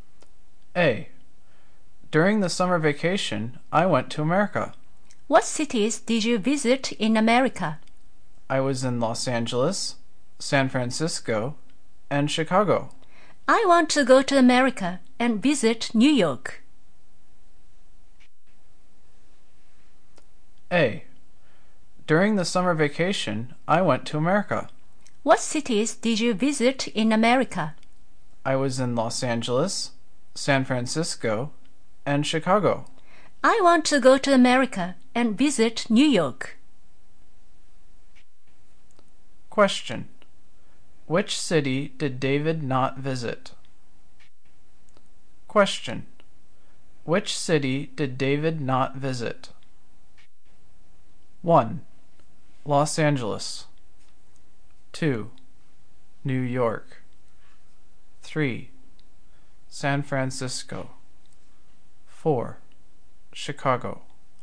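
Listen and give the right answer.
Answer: 2: New York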